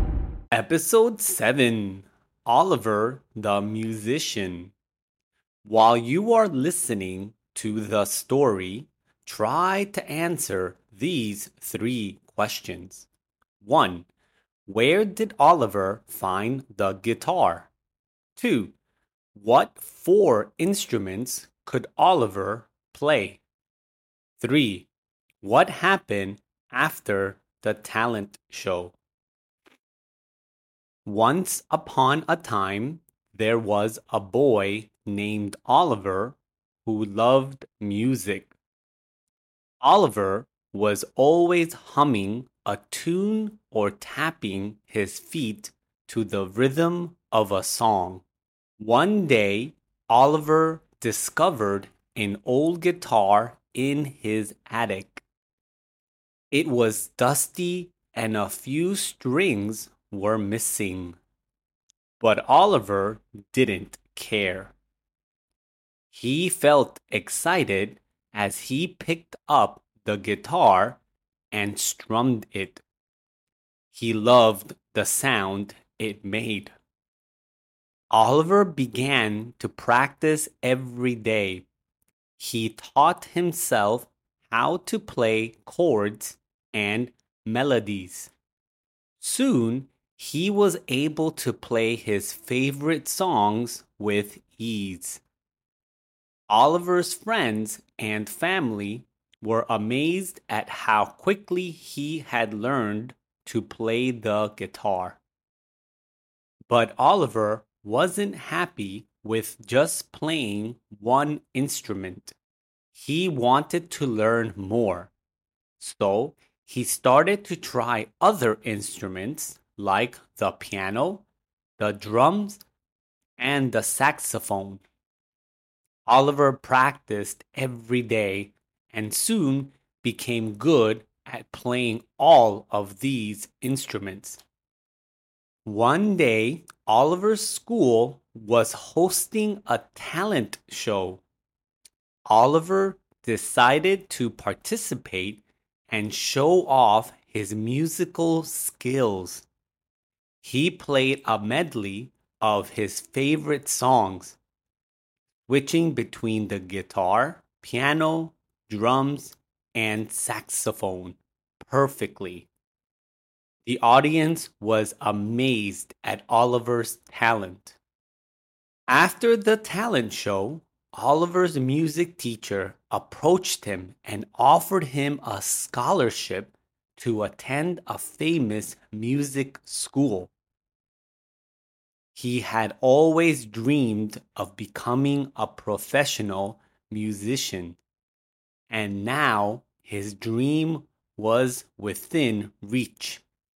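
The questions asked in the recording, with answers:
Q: Where did Oliver find the guitar?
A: In his attic

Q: What four instruments could Oliver play?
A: Guitar, piano, drums and saxophone

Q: What happened after the talent show?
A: His music teacher offered him a scholarship to a famous music school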